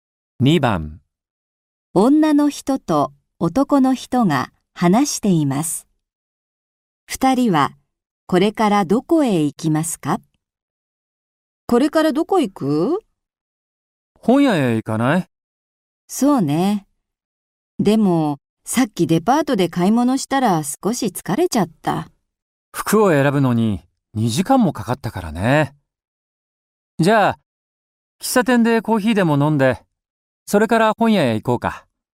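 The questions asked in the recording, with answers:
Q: 二人はこれからどこへ行きますか?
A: 喫茶店(コーヒーを飲んでから本屋)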